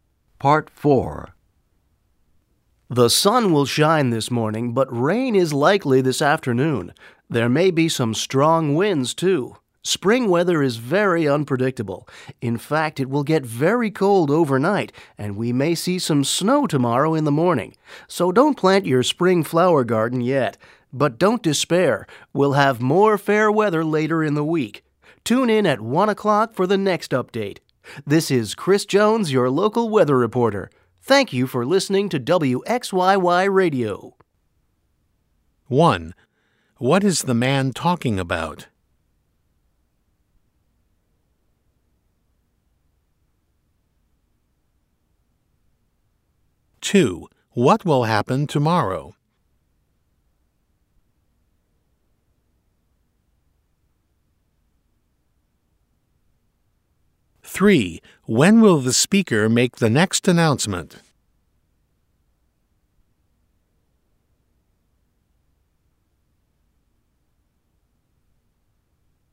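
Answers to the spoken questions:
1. The weather
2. There may be some snow in the morning.
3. At 1 o'clock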